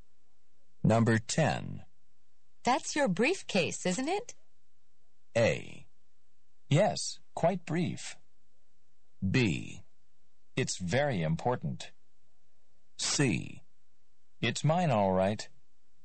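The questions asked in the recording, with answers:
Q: That's your briefcase, isn't it?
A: C: It's mine, all right.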